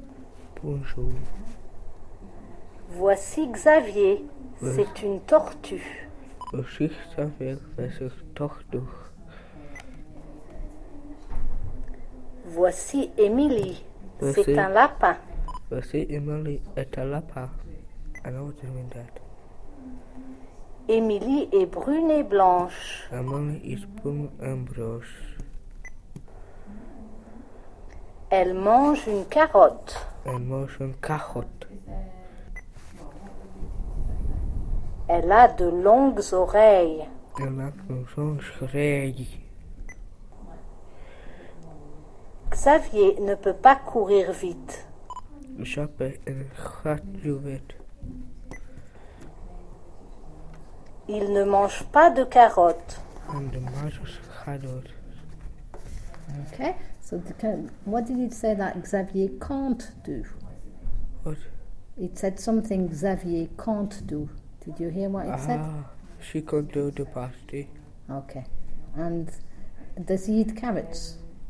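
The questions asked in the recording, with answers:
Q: so what did it say that Xavier can't do?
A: Run fast

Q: And does he eat carrots?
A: No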